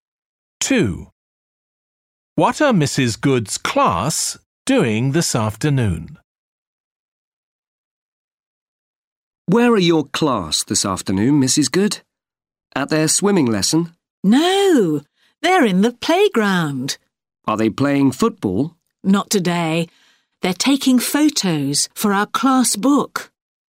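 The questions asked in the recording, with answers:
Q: What are Mrs. Good's class doing this afternoon?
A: Taking photos for the class book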